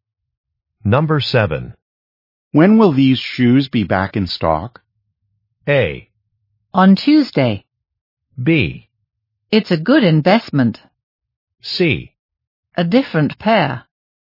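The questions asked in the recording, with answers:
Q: When will these shoes be back in stock?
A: A: On Tuesday.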